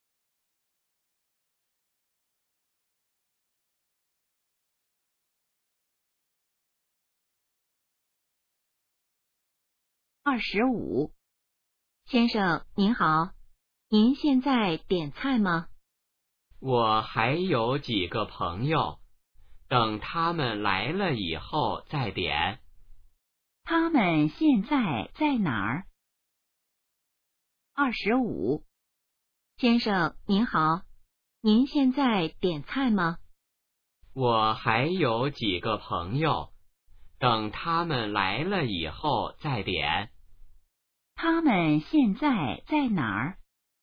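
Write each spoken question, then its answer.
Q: 他们现在在哪儿?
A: 饭馆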